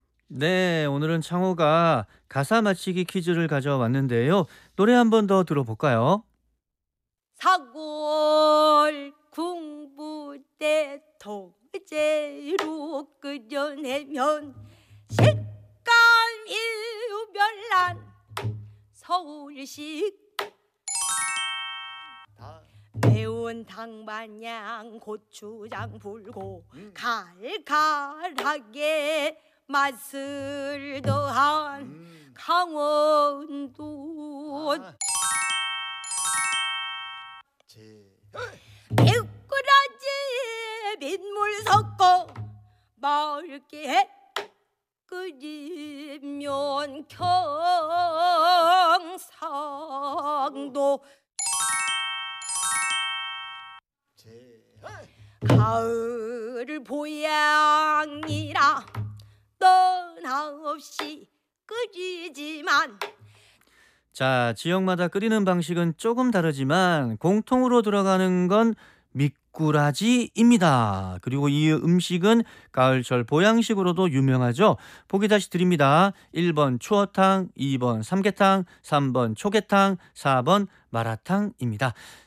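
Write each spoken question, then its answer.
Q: 보기 다시 드립니다. 1번 추어탕, 2번 삼계탕, 3번 초계탕, 4번 마라탕입니다.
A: 1: 추어탕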